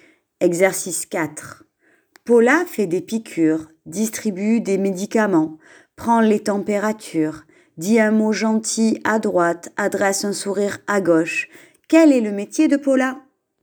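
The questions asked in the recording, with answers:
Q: Quel est le métier de Paula ?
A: Infirmière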